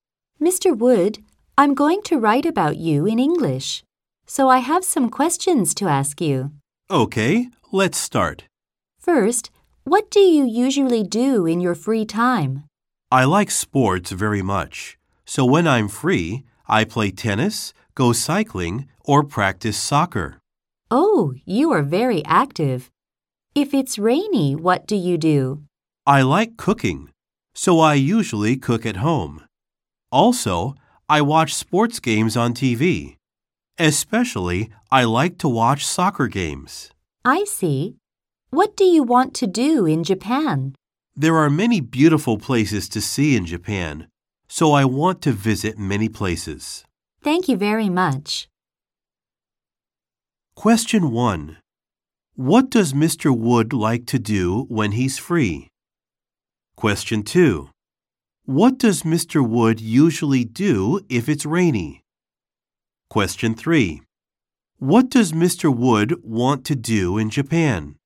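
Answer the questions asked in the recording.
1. He plays sports: tennis, cycling, or soccer
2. He cooks at home
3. Visit many beautiful places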